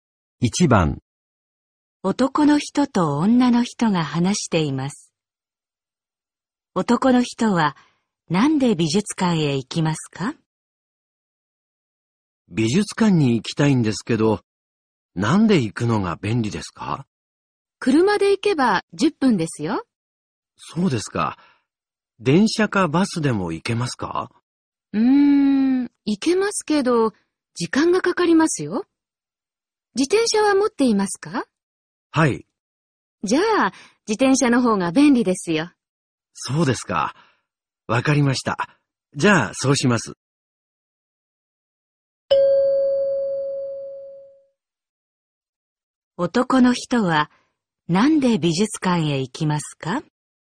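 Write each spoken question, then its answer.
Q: 男の人はなんで美術館へ行きますか?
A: 自転車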